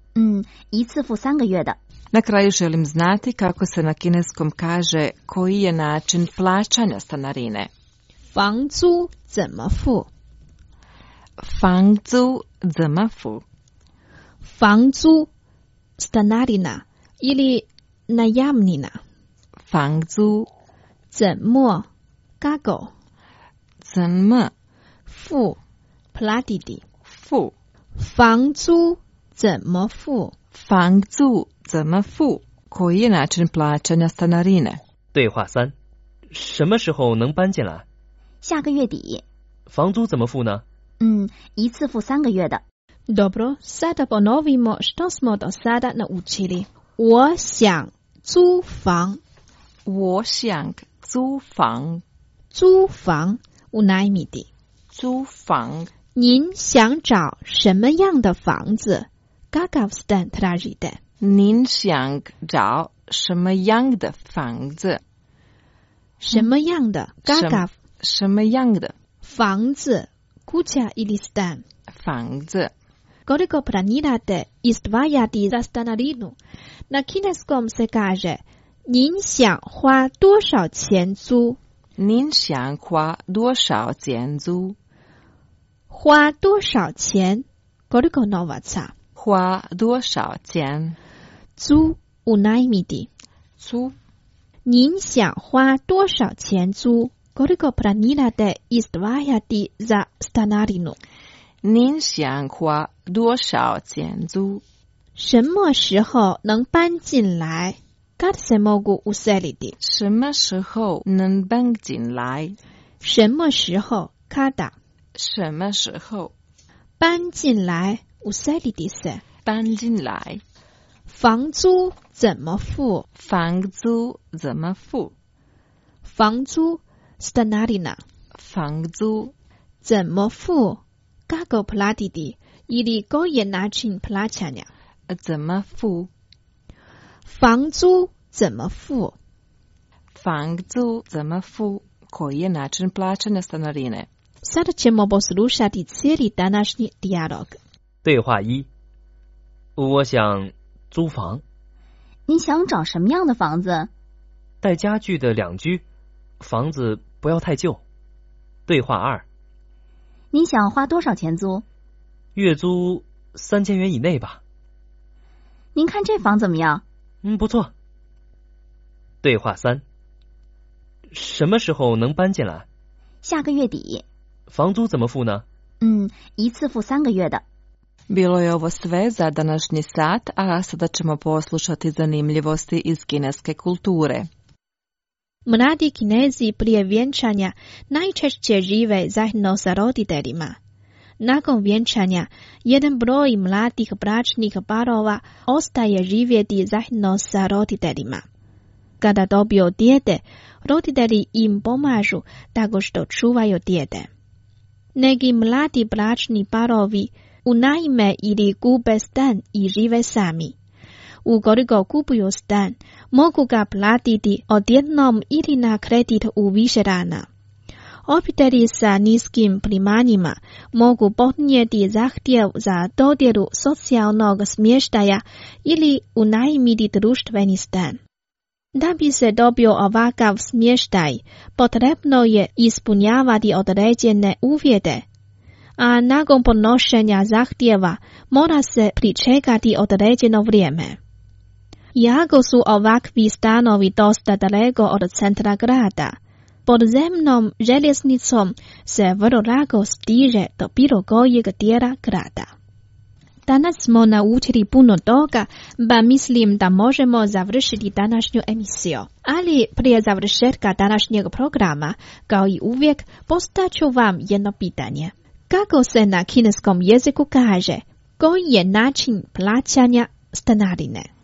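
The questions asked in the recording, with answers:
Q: Kako se na kineskom jeziku kaže, koji je način plaćanja stanarine?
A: 房租怎么付?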